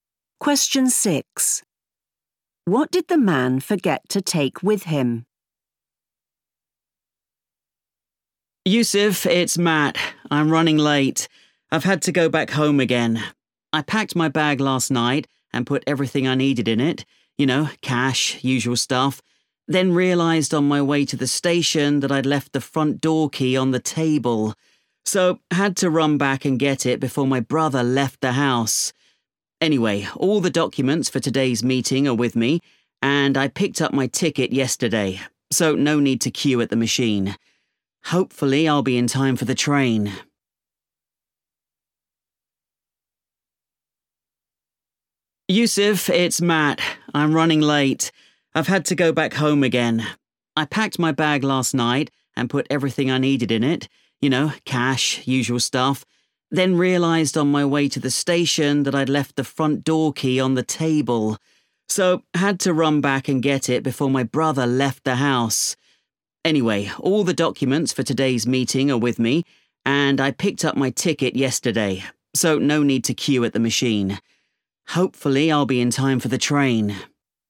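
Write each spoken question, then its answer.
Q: What did the man forget to take with him?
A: the front door key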